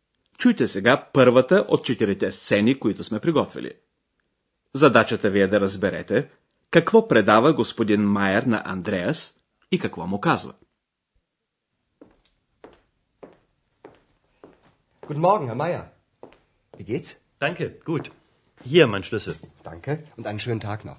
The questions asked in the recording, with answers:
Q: Задачата ви е да разберете какво предава господин Майер на Андреас и какво му казва.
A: Господин Майер поставя ключа си на масата и казва Ето моя ключ.